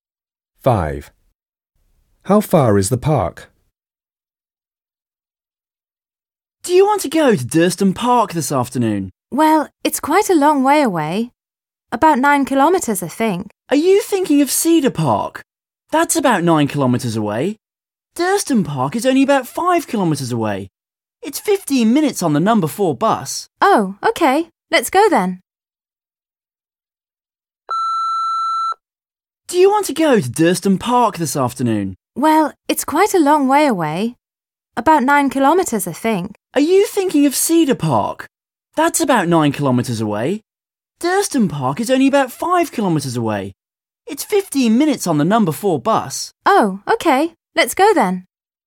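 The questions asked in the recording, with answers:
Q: How far is the park?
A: about 5 kilometres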